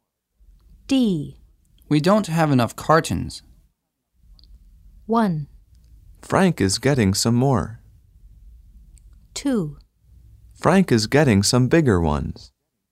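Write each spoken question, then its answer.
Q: We don't have enough cartons.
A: 1: Frank is getting some more.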